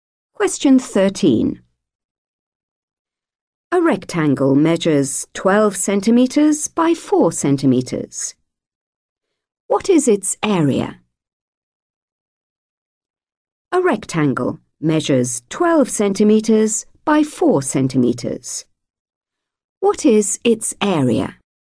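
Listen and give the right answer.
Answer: 48 square centimetres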